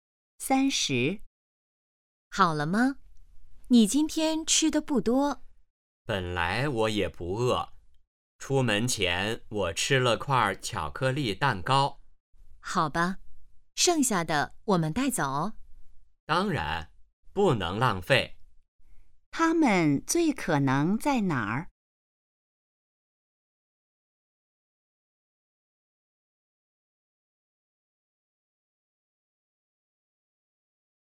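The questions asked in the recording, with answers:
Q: 他们最可能在哪儿?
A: 饭馆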